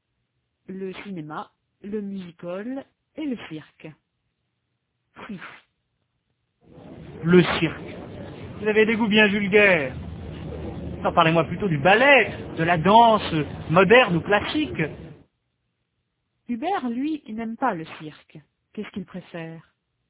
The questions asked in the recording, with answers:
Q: Qu'est-ce qu'il préfère ?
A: Le ballet, la danse moderne ou classique.